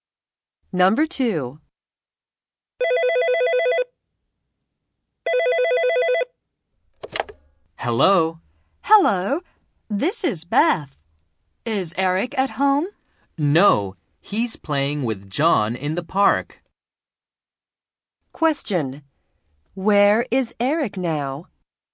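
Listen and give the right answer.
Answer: In the park.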